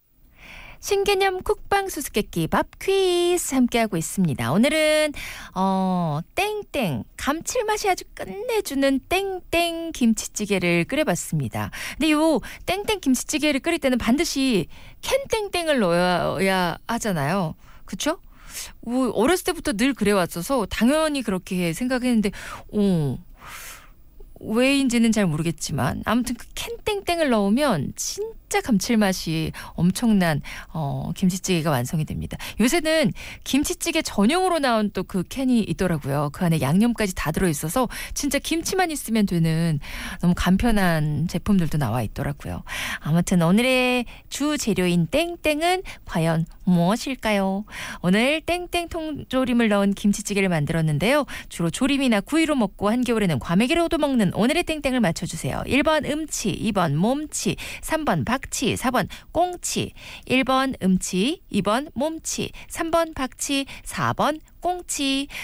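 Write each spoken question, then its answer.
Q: 주로 조림이나 구이로 먹고 한겨울에는 과메기로도 먹는 오늘의 땡땡을 맞춰주세요.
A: 4: 꽁치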